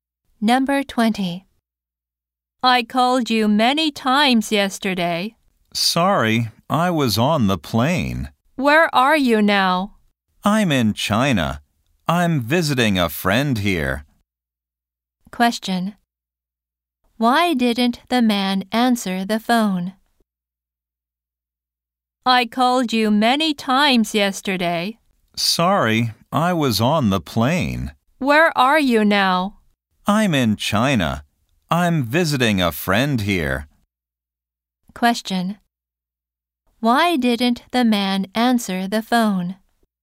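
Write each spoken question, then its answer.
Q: Question. Why didn't the man answer the phone?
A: He was on the plane.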